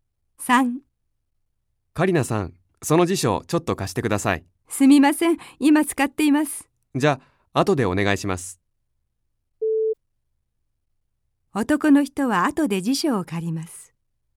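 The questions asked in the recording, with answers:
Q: 男の人は後で辞書を借ります。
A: ○(正しい)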